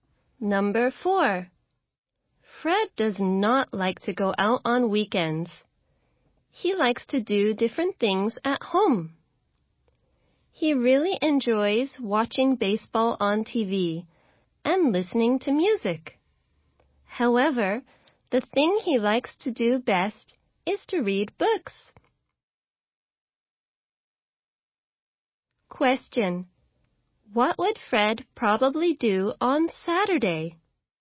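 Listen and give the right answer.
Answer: Read books at home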